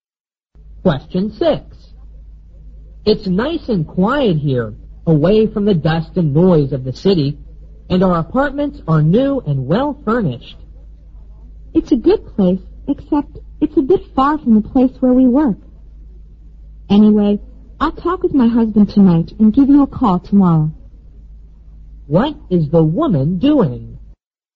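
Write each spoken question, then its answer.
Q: What is the woman doing?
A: Looking at an apartment to rent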